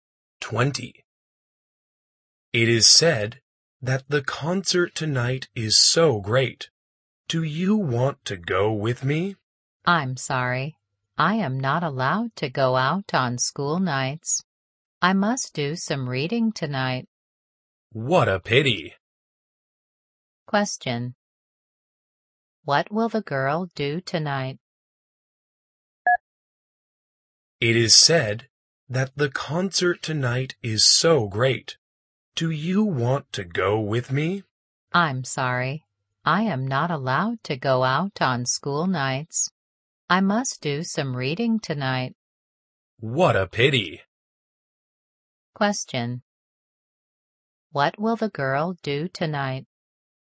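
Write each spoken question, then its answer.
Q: What will the girl do tonight?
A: Do some reading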